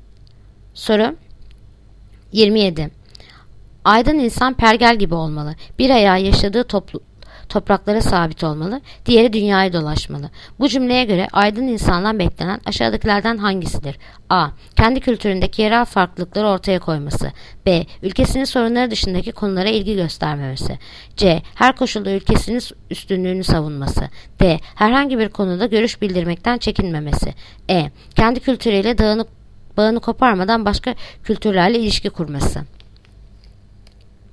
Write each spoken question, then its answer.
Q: Bu cümleye göre aydın insandan beklenen aşağıdakilerden hangisidir?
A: Yanıt Edirne. Kendi kültürüyle bağını koparmadan başka kültürlerle ilişki kurması.